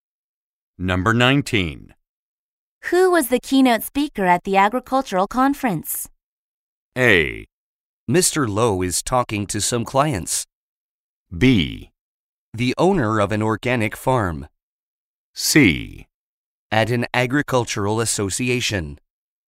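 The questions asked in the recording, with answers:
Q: Who was the keynote speaker at the agricultural conference?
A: B: The owner of an organic farm.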